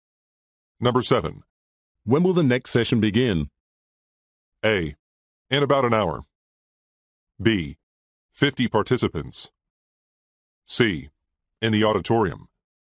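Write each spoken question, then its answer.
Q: When will the next session begin?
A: A: In about an hour.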